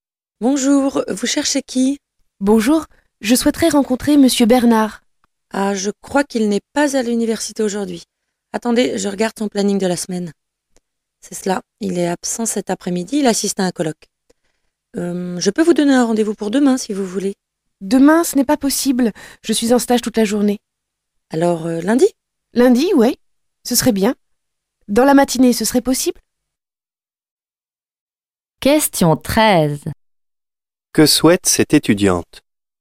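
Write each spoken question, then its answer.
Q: Que souhaite cette étudiante?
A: Rencontrer Monsieur Bernard (avoir un rendez-vous avec lui)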